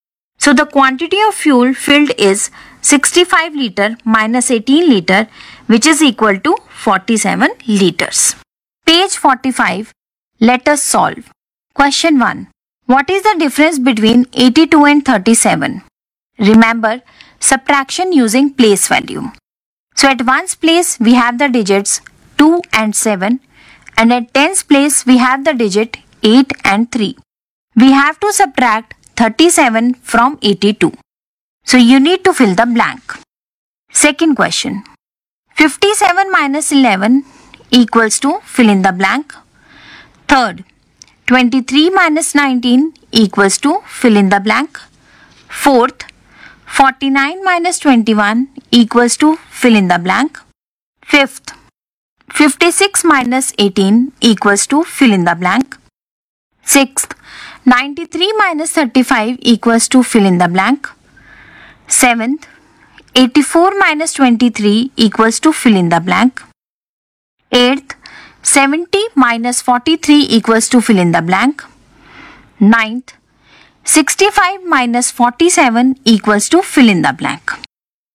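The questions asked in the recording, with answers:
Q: 65 minus 47 equals to fill in the blank.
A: 18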